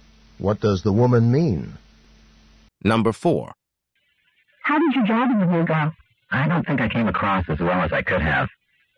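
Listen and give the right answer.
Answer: He doesn't think his interview went well.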